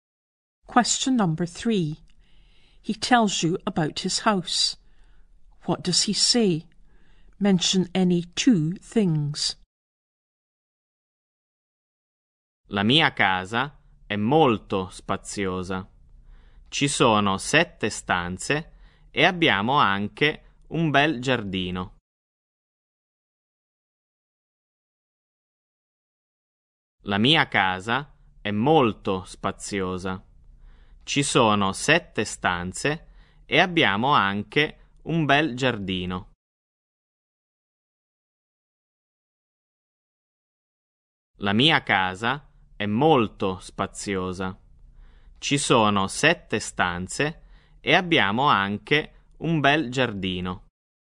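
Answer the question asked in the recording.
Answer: Very spacious; 7 rooms; a nice garden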